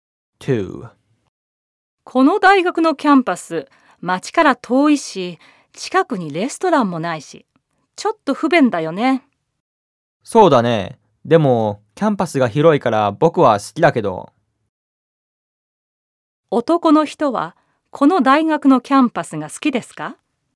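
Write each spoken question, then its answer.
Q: 男の人は、この大学のキャンパスが好きですか?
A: はい、好きです。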